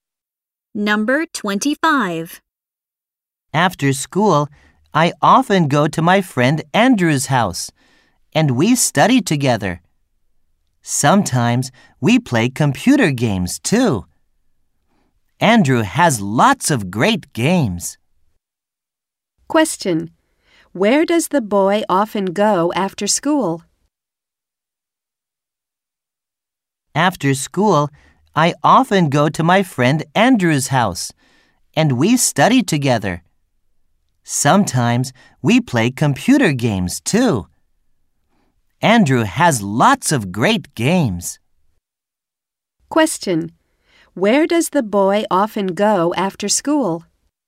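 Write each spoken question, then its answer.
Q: Where does the boy often go after school?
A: To his friend Andrew's house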